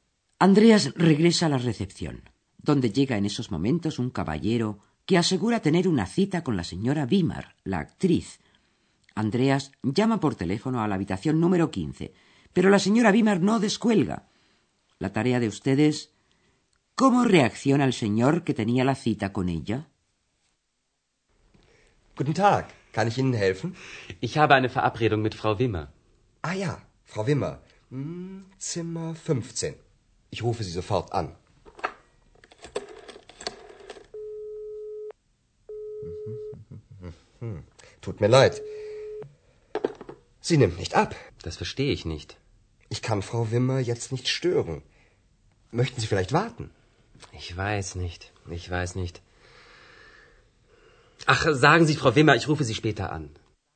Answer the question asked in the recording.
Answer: El visitante le pide a Andreas que le comunique a la señora Wimmer que va a llamarla más tarde.